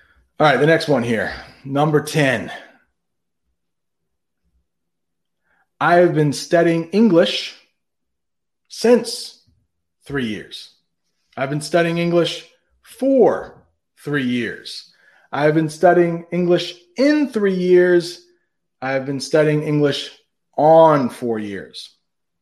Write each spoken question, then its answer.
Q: I have been studying English since three years.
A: I have been studying English for three years.